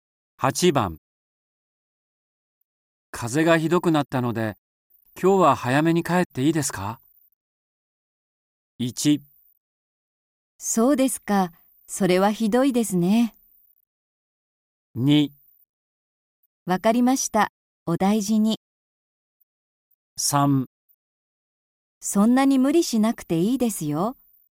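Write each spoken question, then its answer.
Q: 風がひどくなったので、今日は早めに帰っていいですか?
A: 2: わかりました。お大事に。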